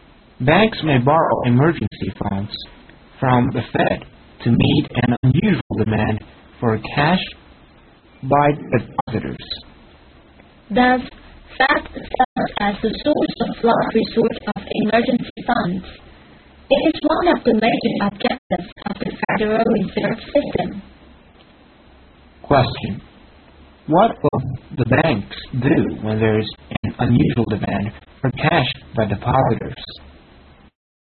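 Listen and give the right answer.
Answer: Borrow emergency funds from the Fed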